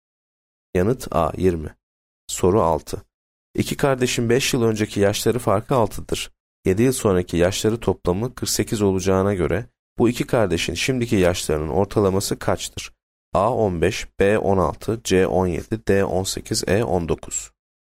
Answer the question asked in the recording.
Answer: Yanıt C 17.